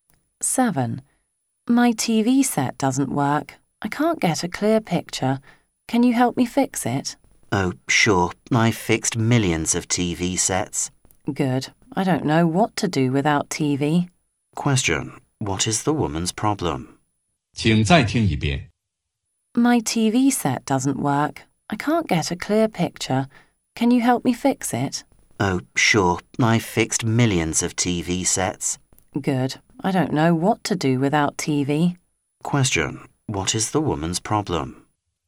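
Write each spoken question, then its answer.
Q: What is the woman's problem?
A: Her TV set doesn't work; she can't get a clear picture.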